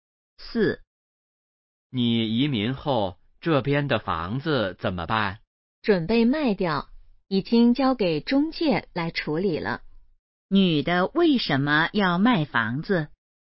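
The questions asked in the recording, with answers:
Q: 女的为什么要卖房子?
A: 她要移民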